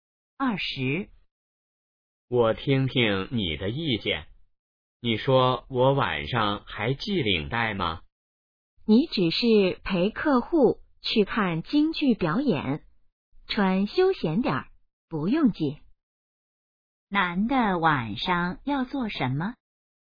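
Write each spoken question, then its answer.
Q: 男的晚上要做什么?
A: 陪客户看京剧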